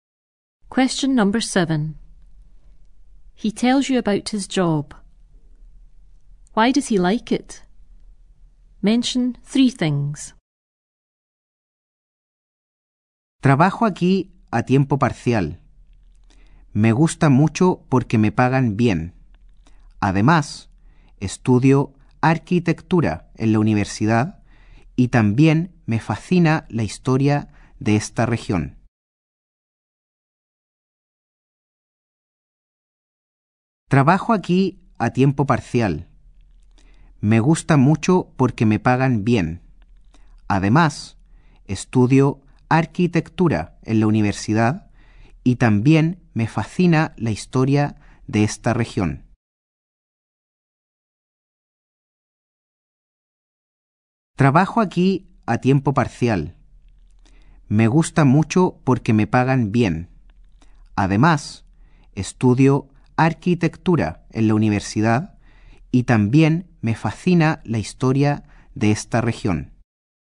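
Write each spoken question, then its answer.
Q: Why does he like it?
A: He is well paid, he studies architecture at university, and he is fascinated by the region's history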